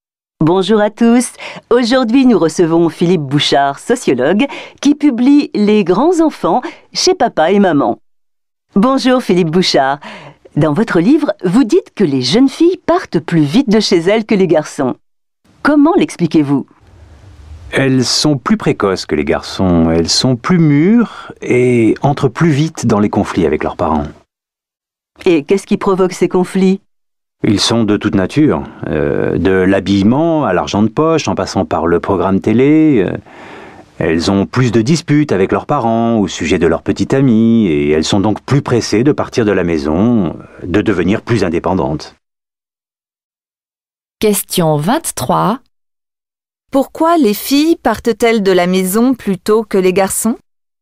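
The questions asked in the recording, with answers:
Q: Pourquoi les filles partent-elles de la maison plutôt que les garçons ?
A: Elles sont plus précoces et mûres, donc elles entrent plus vite en conflit avec leurs parents et veulent devenir indépendantes.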